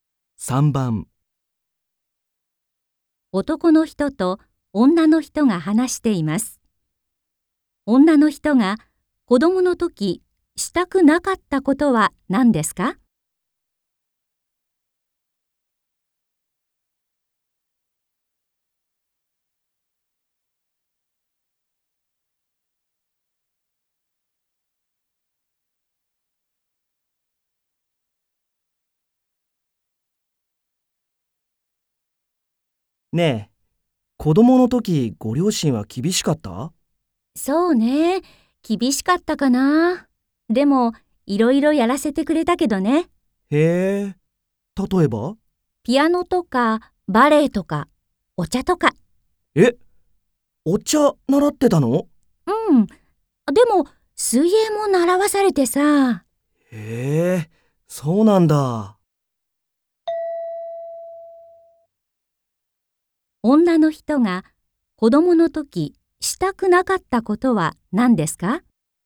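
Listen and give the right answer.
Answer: 水泳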